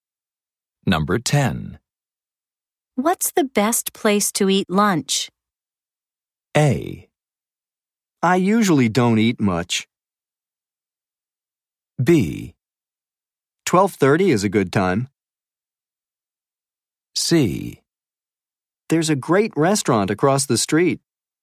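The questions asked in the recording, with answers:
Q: What's the best place to eat lunch?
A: C: There's a great restaurant across the street.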